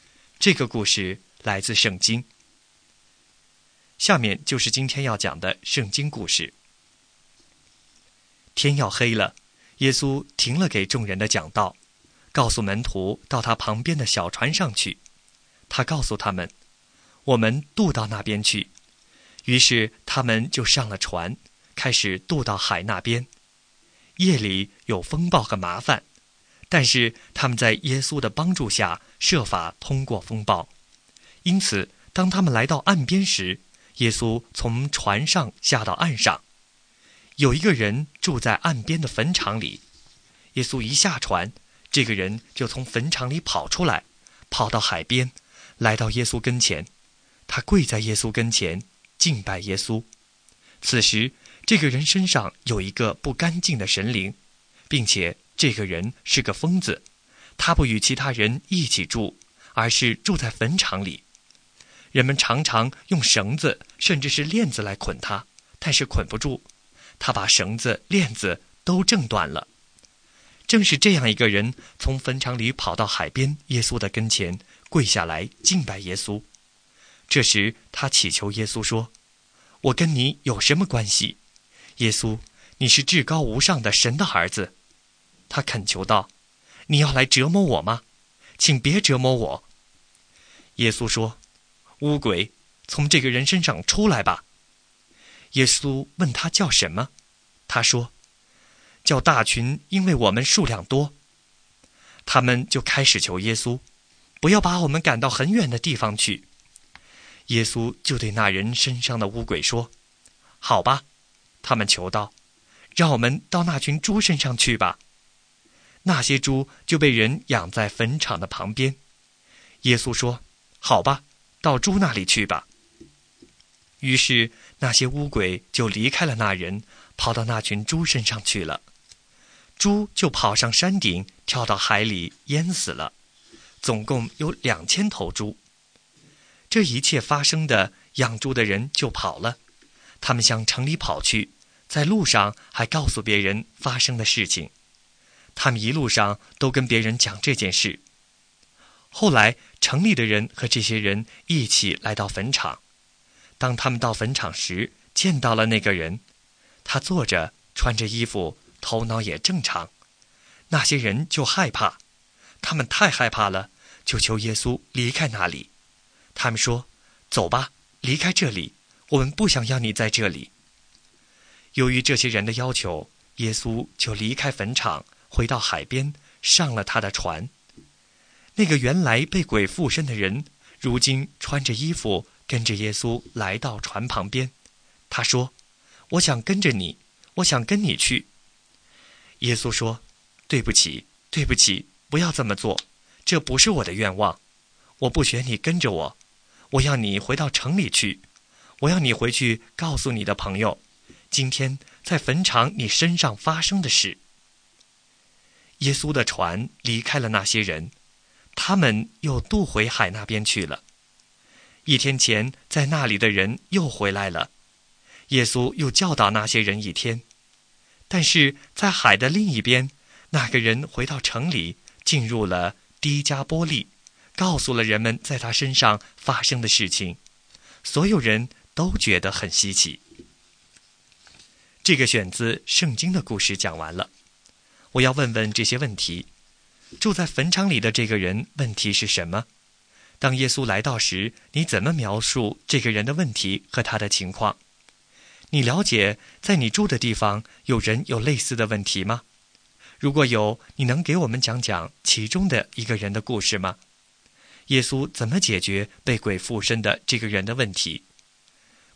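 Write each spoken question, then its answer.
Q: 住在坟场里的这个人问题是什么?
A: 他被污鬼附身,是个疯子,住在坟场里,绳子和链子都捆不住他

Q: 耶稣怎么解决被鬼附身的这个人的问题?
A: 耶稣命令污鬼从他身上出来,让污鬼进入猪群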